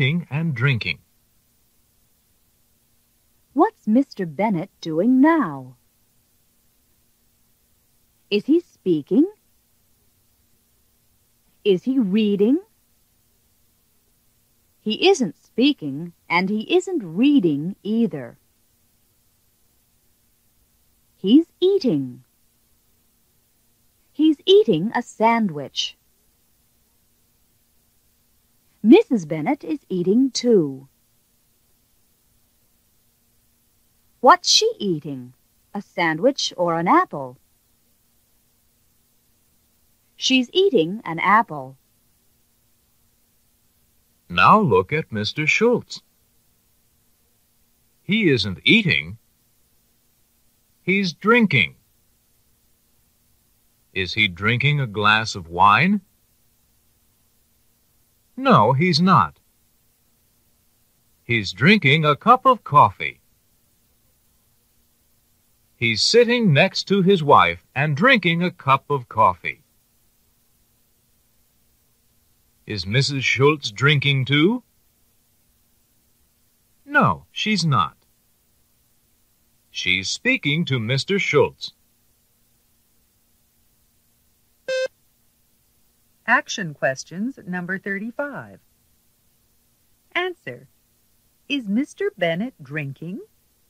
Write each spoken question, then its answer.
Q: Is Mr. Bennett drinking?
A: No, he's not.